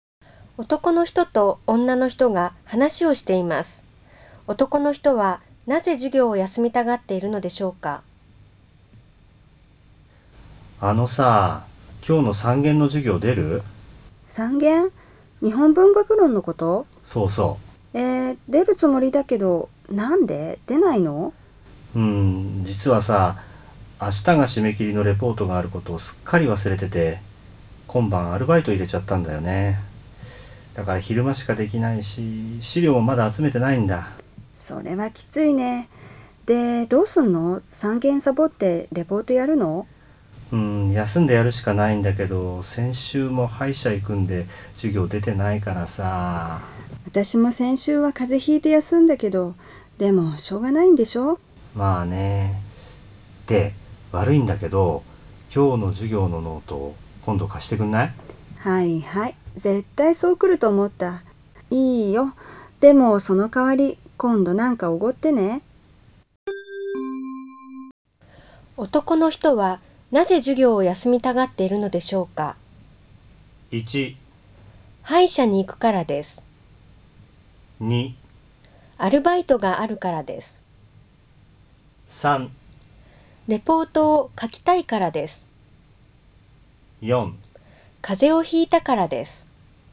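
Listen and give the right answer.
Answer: 3: レポートを書きたいからです。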